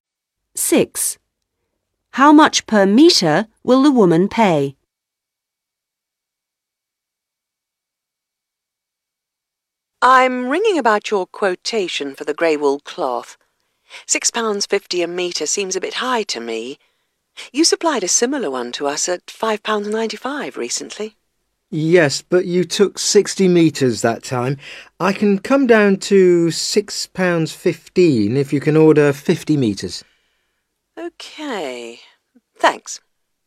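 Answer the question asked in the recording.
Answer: £6.15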